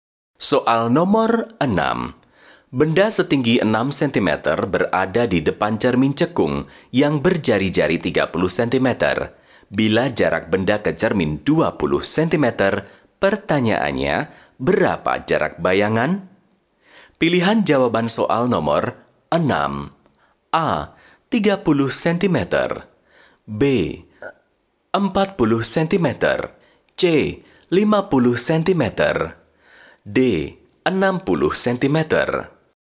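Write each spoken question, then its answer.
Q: Bila jarak benda ke cermin 20 cm, pertanyaannya, berapa jarak bayangan?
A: D: 60 cm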